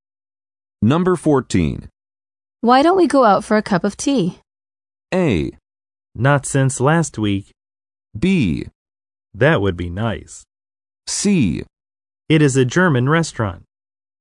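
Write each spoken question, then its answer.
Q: Why don't we go out for a cup of tea?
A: B: That would be nice.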